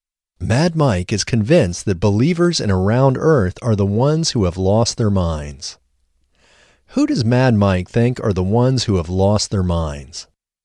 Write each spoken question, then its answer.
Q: Who does Mad Mike think are the ones who have lost their minds?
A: Mad Mike thinks that believers in a round Earth are the ones who have lost their minds.